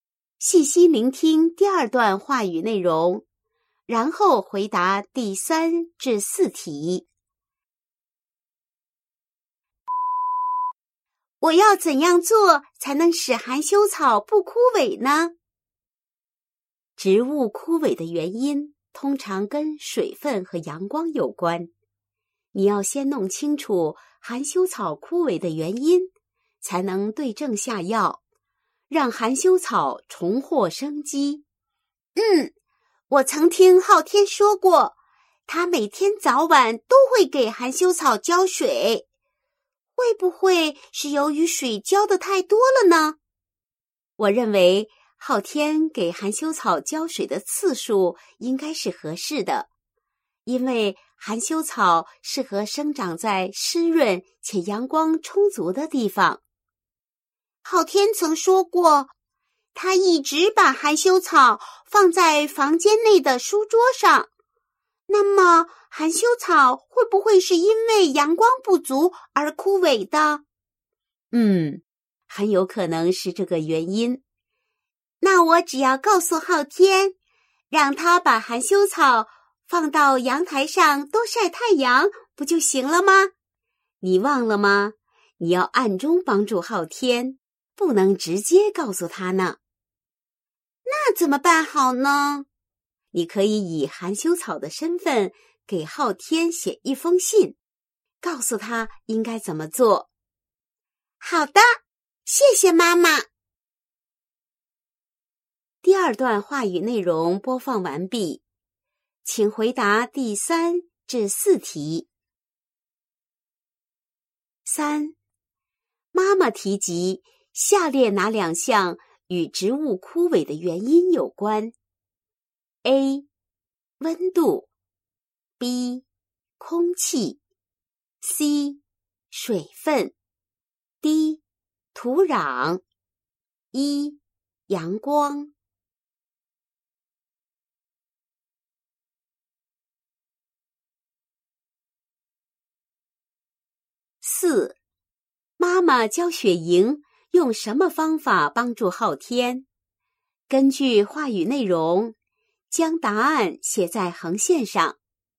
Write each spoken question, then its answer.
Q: 妈妈教雪莹用什么方法帮助昊天?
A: 小天使含羞草的身份写信给昊天,告诉他应该给含羞草多浇水、晒太阳